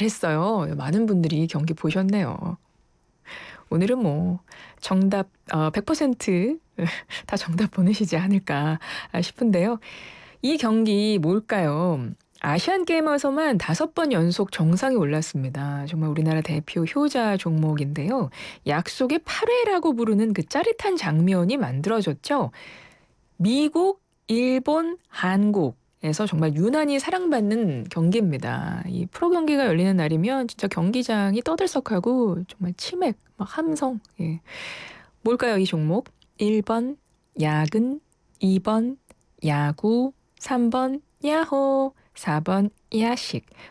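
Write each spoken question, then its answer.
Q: 뭘까요, 이 종목? 1번 야근, 2번 야구, 3번 야호, 4번 야식.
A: 2: 야구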